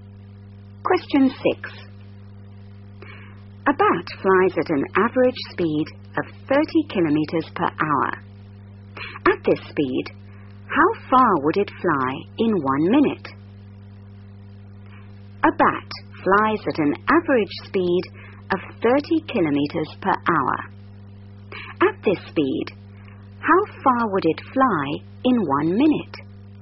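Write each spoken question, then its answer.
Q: At this speed, how far would it fly in 1 minute?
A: 0.5 km (500 m)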